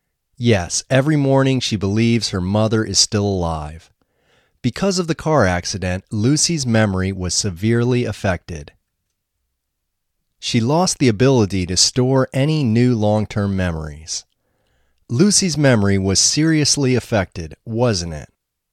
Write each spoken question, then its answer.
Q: Lucy's memory was seriously affected, wasn't it?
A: Yes, her memory was seriously affected.